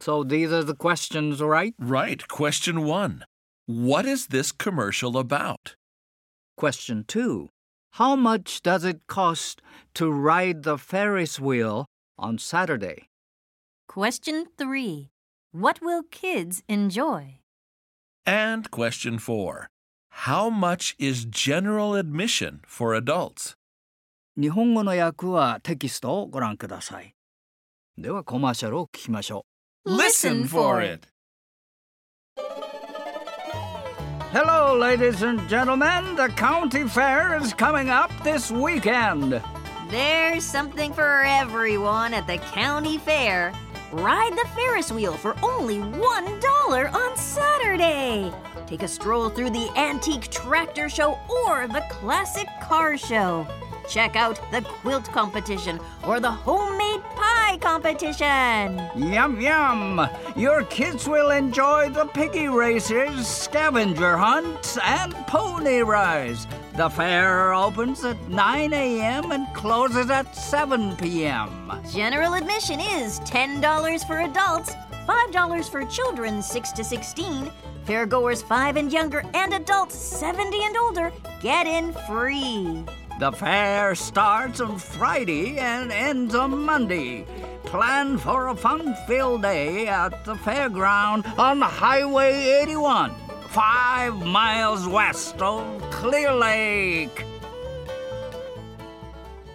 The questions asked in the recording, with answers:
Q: What is this commercial about?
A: Well, the answer should be the county fair this weekend.

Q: What will kids enjoy?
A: Oh, piggy races, scavenger hunts, and pony rides.

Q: How much is general admission for adults?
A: $10.